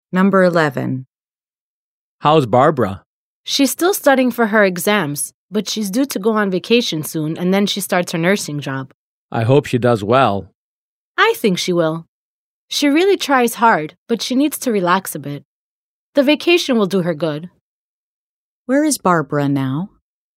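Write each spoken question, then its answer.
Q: Where is Barbara now?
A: Studying for her exams (at school)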